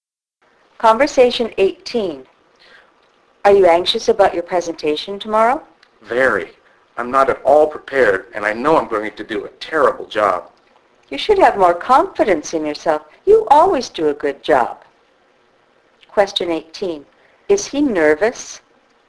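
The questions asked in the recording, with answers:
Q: Is he nervous?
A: Yes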